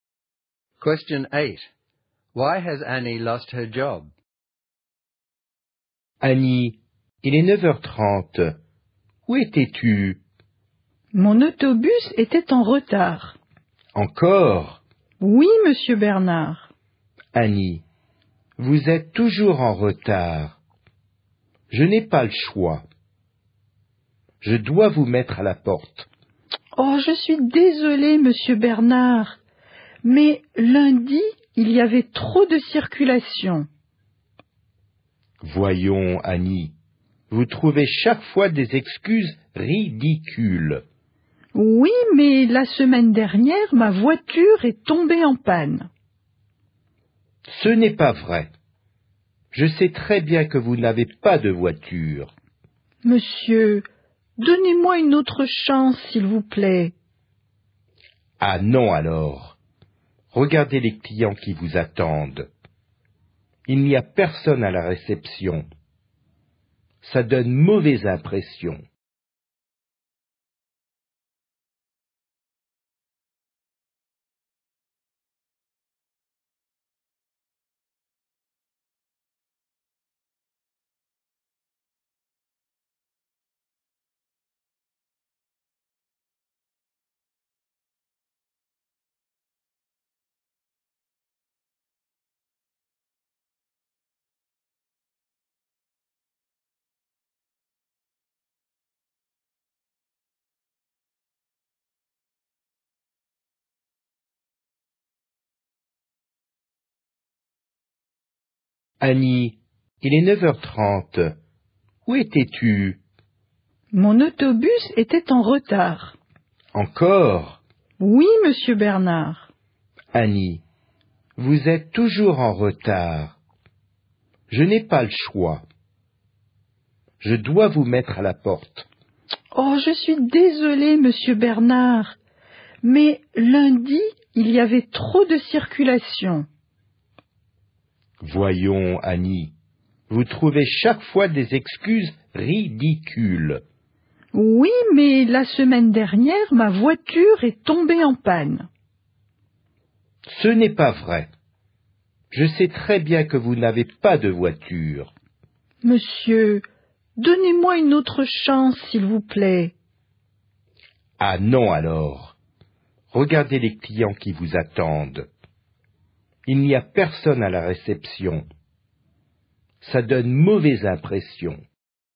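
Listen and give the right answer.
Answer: She is always late, makes ridiculous excuses, and clients are left waiting with no one at reception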